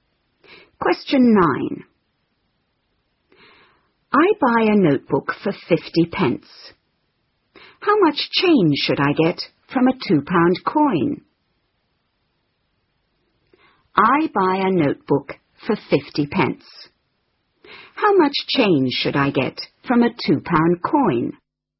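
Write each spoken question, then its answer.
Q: How much change should I get from a £2 coin?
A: £1.50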